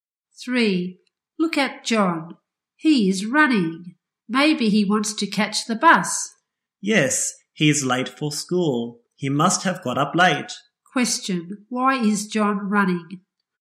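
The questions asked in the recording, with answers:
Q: Question, why is John running?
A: He is late for school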